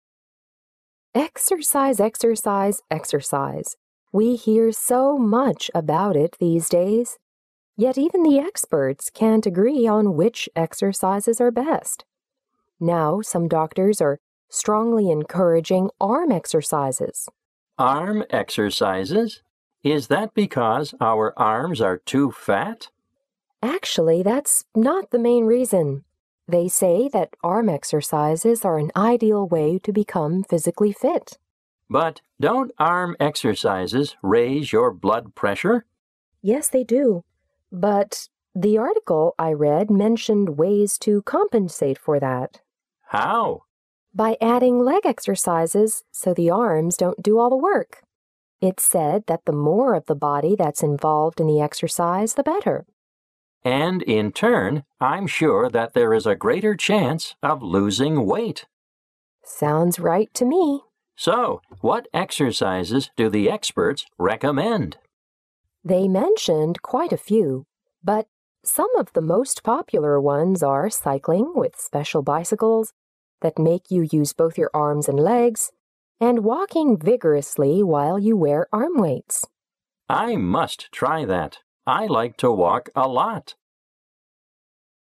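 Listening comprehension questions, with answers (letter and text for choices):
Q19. According to the conversation, what is one problem with arm exercises?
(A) They can't get rid of flabby arms.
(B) They can damage arm muscles.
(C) They aren't acceptable to most people.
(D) They can raise one's blood pressure.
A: (D) They can raise one's blood pressure.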